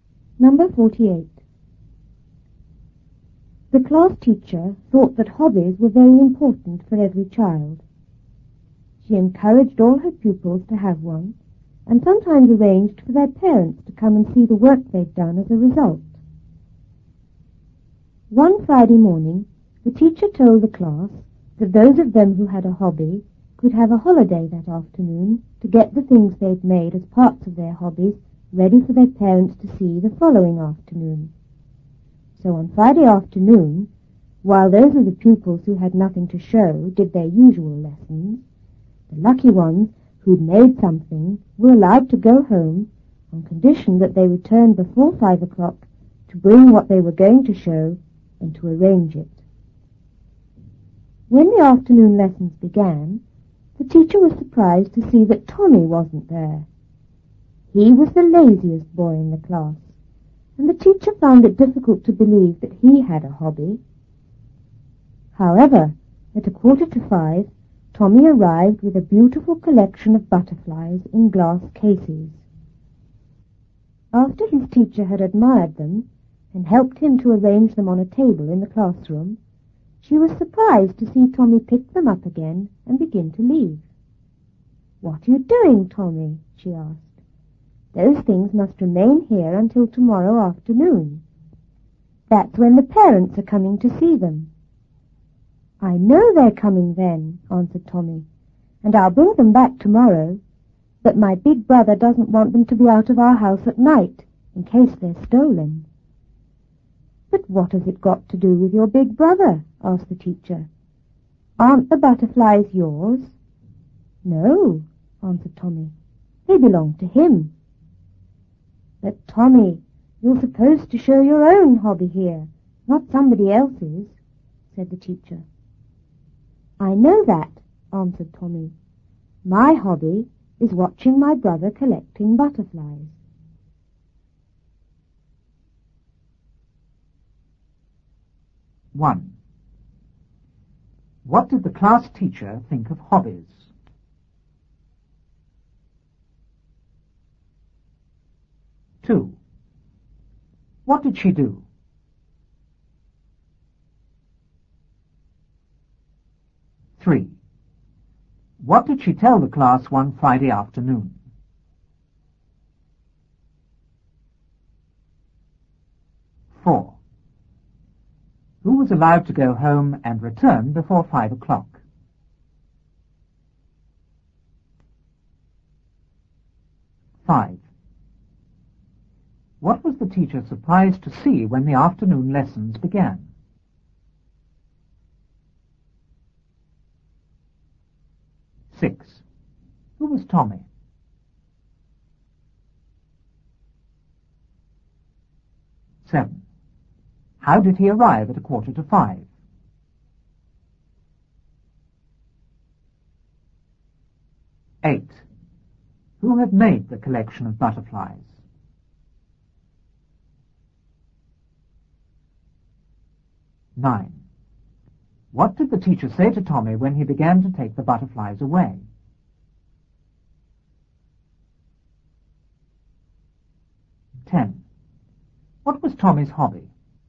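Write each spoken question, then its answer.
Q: What did the class teacher think of hobbies?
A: That they were very important for every child

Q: What did she do?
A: She encouraged her pupils to have one and sometimes arranged for parents to come and see their work

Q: What did she tell the class one Friday afternoon?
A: That those with a hobby could have the afternoon off to get their things ready for their parents to see the next afternoon

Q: Who was allowed to go home and return before 5 o'clock?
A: The pupils who had made something for their hobby

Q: What was the teacher surprised to see when the afternoon lessons began?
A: That Tommy wasn't there

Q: Who was Tommy?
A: The laziest boy in the class

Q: How did he arrive at 4:45?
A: With a beautiful collection of butterflies in glass cases

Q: Who had made the collection of butterflies?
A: Tommy's big brother

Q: What did the teacher say to Tommy when he began to take the butterflies away?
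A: That they must stay there until the parents came the next afternoon

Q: What was Tommy's hobby?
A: Watching his brother collect butterflies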